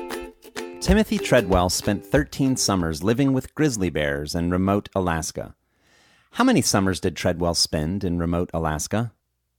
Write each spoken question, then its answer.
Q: How many summers did Treadwell spend in remote Alaska?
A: Treadwell spent 13 summers in remote Alaska.